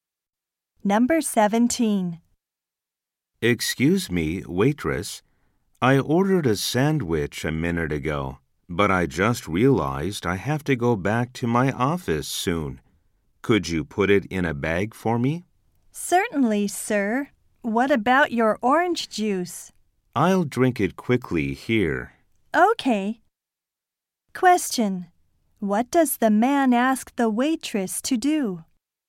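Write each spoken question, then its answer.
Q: What does the man ask the waitress to do?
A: Put his sandwich in a bag.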